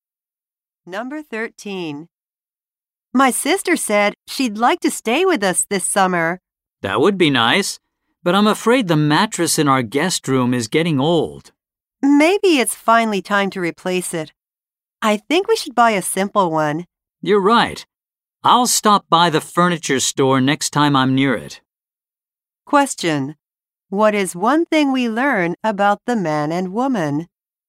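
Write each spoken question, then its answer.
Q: What is one thing we learn about the man and woman?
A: They plan to replace the old mattress in their guest room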